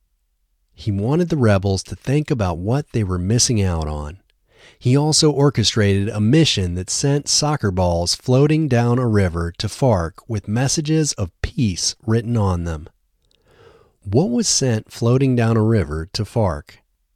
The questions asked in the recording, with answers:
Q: What was sent floating down a river to FARC?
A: Soccer balls were sent floating down a river to FARC.